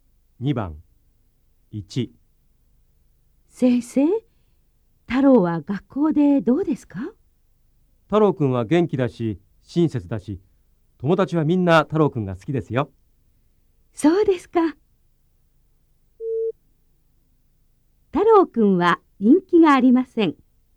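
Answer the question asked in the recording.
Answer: ×(人気があります)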